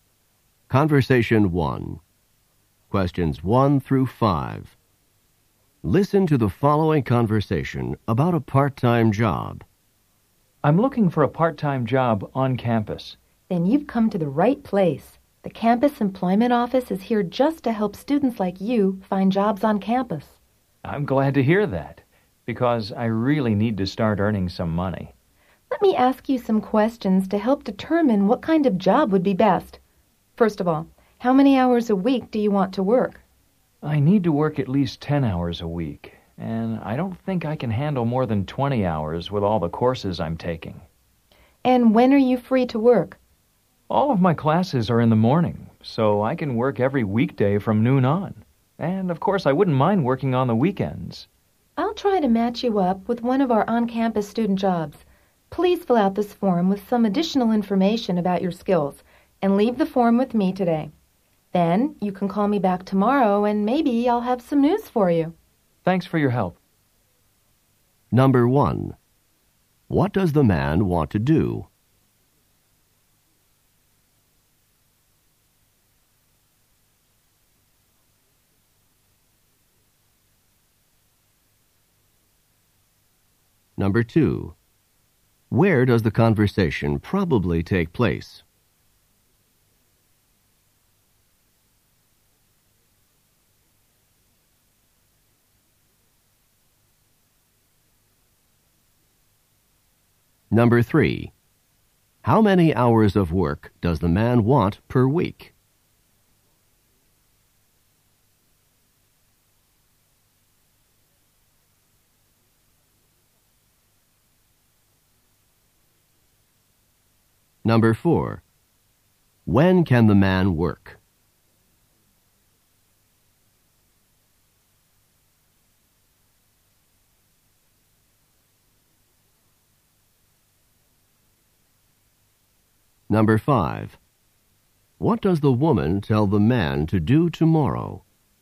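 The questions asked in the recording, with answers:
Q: What does the man want to do?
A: Get a part-time job on campus

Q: Where does the conversation probably take place?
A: In the campus employment office

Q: How many hours of work does the man want per week?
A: 10 to 20 hours

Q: When can the man work?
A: Weekday afternoons from noon on, and weekends

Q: What does the woman tell the man to do tomorrow?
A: Call her back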